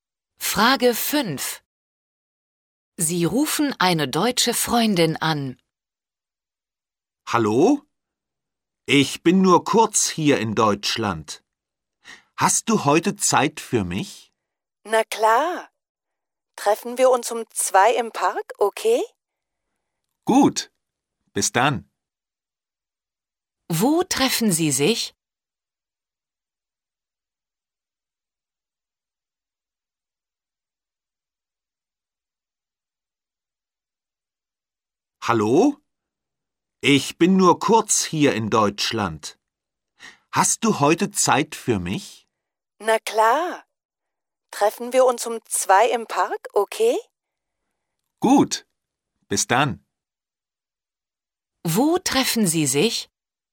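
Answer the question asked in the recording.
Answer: Im Park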